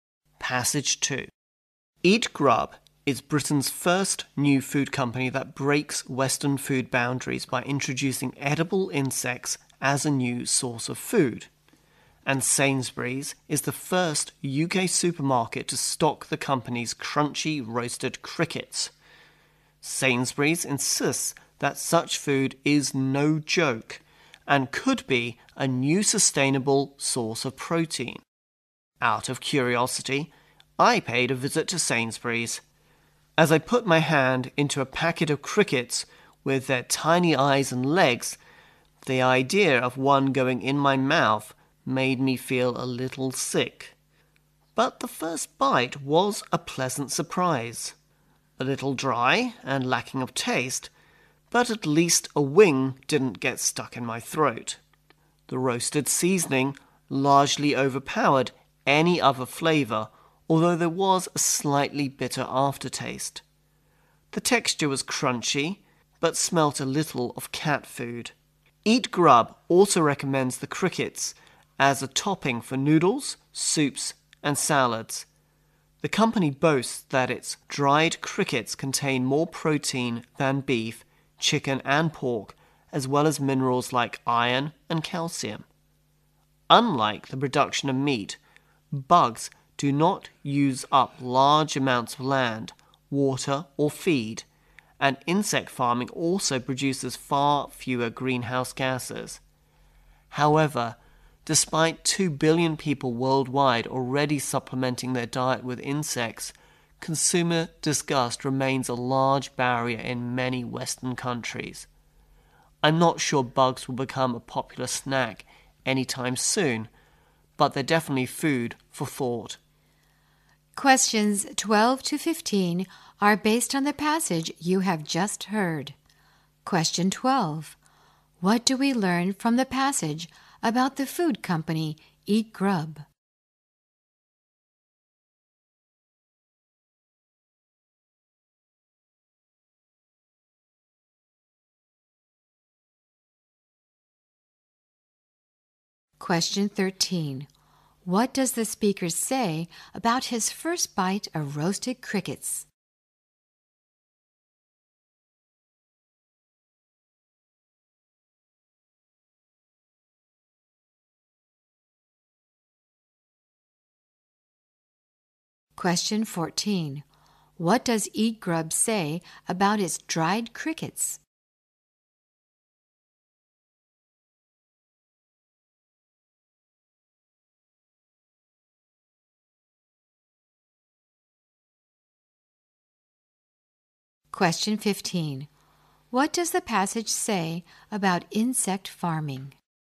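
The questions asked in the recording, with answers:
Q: What do we learn from the passage about the food company Eat Grub?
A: It is Britain's first company to introduce edible insects as food.

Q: What does the speaker say about his first bite of roasted crickets?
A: It was a pleasant surprise.

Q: What does Eat Grub say about its dried crickets?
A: They contain more protein than beef, chicken and pork.

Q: What does the passage say about insect farming?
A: It produces far fewer greenhouse gases and uses less land, water and feed.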